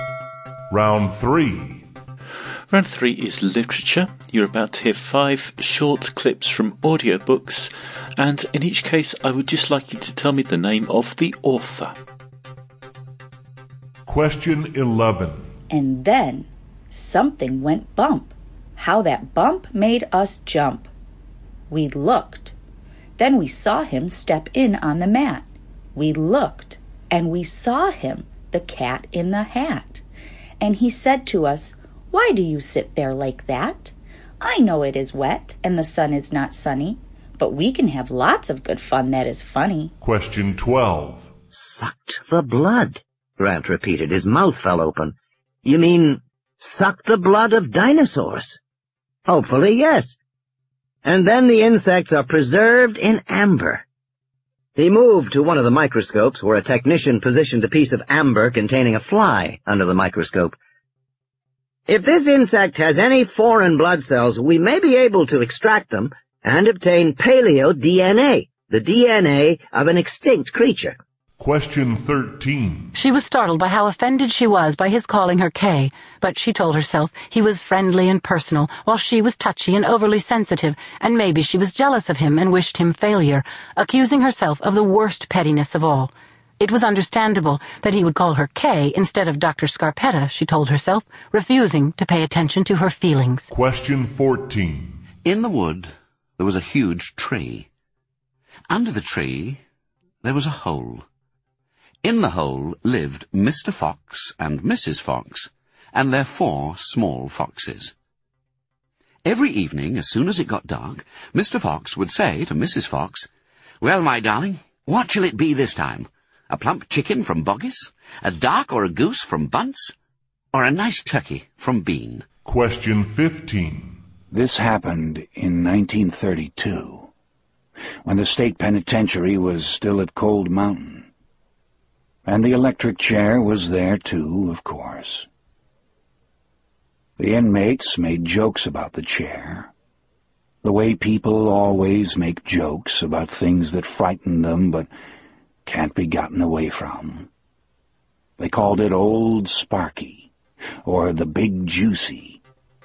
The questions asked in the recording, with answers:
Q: Question 11.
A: Number 11 was The Cat in the Hat by Dr.

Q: Question 12.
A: Number 12 was Jurassic Park by Michael Crichton.

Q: Question 13.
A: Number 13 was Trace by Patricia Cornwell.

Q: Question 14.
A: Fox by Roald Dahl.

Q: Question 15.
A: And number 15 was The Green Mile by Stephen King.